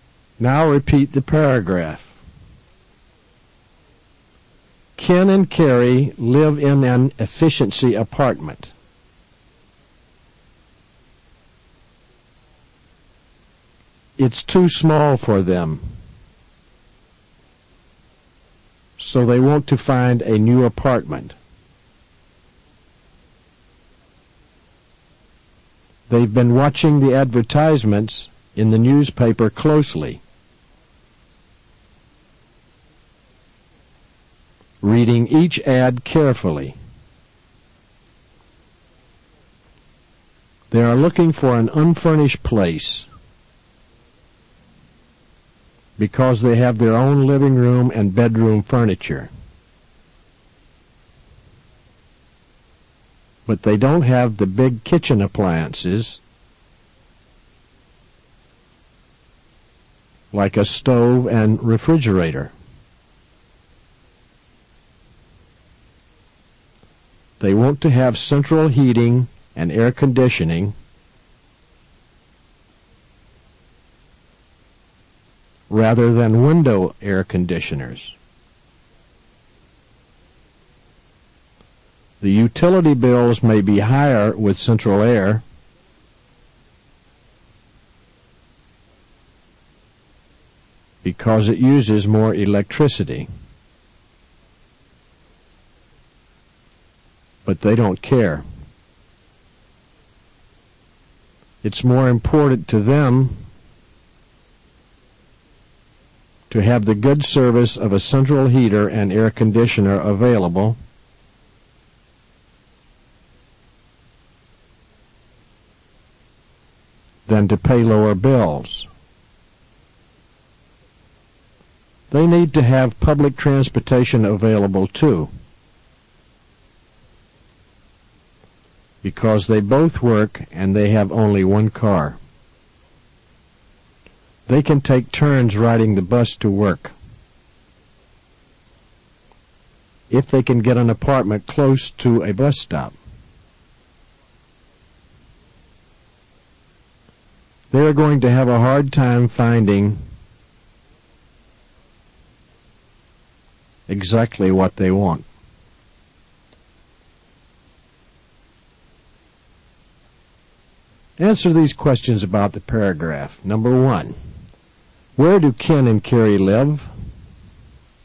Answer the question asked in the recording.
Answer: Repeat, they live in an efficiency apartment.